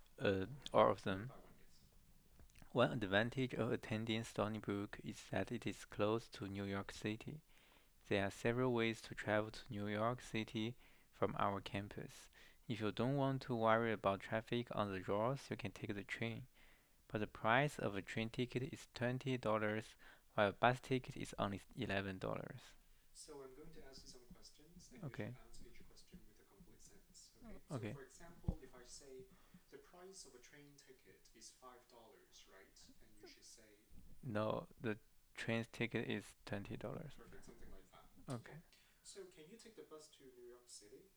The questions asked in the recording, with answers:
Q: So can you take the bus to New York City?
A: Yes, you can take the bus to New York City.